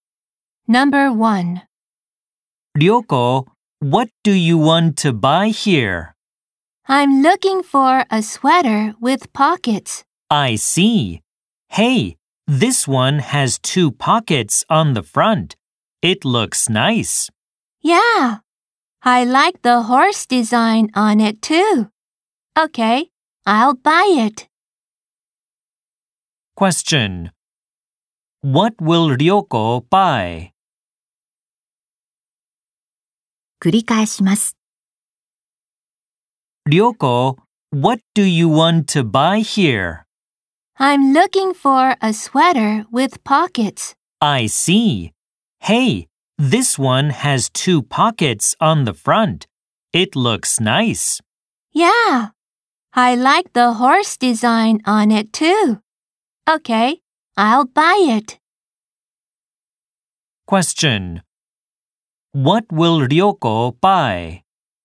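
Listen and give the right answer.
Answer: A sweater with two pockets on the front and a horse design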